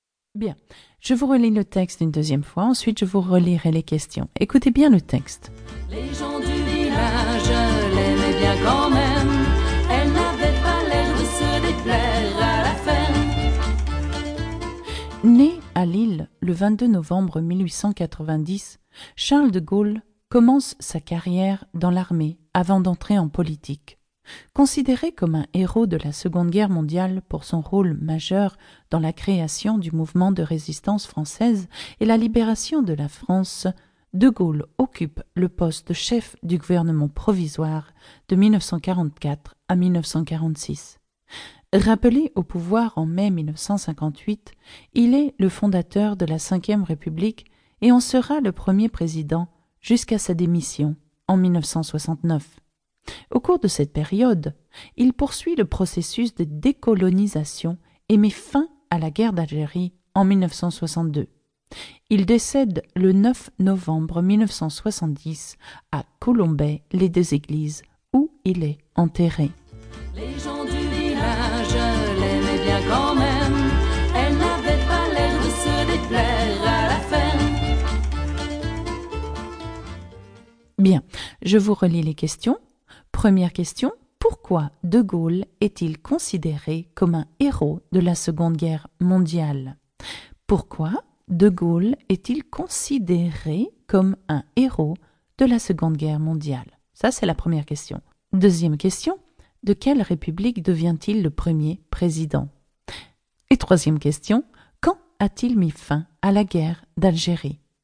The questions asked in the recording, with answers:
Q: Pourquoi de Gaulle est-il considéré comme un héros de la Seconde Guerre mondiale?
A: Parce que il a joué un rôle majeur dans la création du mouvement de la résistance française et de la libération de la France.

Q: de quelle république devient-il le premier président?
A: Oui, absolument, la Cinquième République.

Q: quand a-t-il mis fin à la guerre d'Algérie?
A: Il met fin à la guerre d'Algérie en 1962.